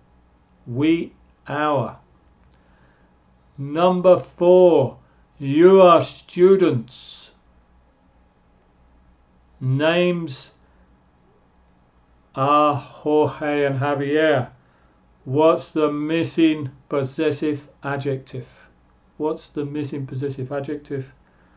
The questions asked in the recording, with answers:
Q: What's the missing possessive adjective?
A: you are students, your.